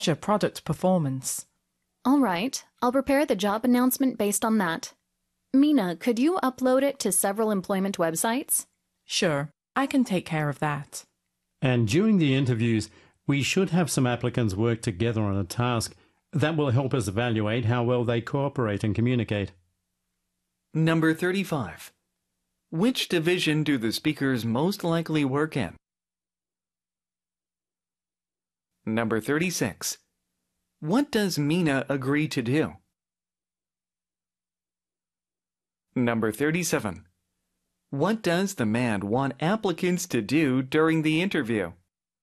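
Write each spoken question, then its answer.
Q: What does Mina agree to do?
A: Upload the job announcement to several employment websites

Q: What does the man want applicants to do during the interview?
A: Work together on a task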